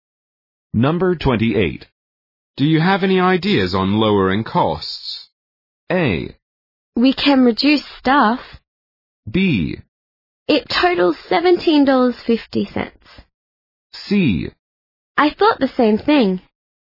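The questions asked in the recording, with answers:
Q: Do you have any ideas on lowering costs?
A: A: We can reduce staff.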